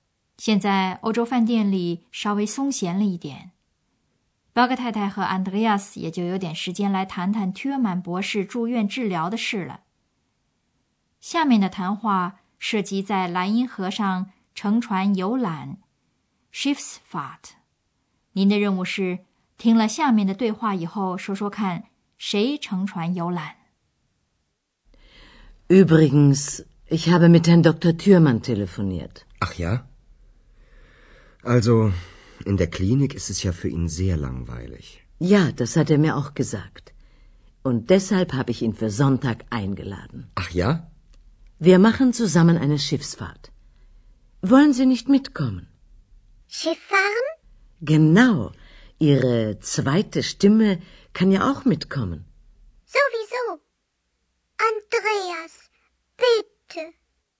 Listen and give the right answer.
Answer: 表格太太邀请了Thürmann博士在蓝银河上乘船游览。